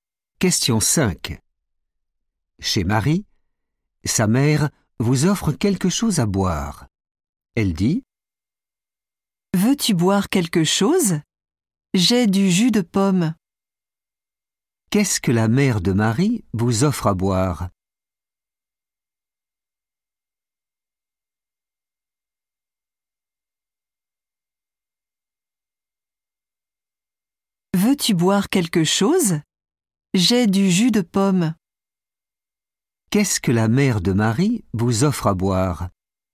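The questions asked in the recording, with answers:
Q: Qu'est-ce que la mère de Marie vous offre à boire ?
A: du jus de pomme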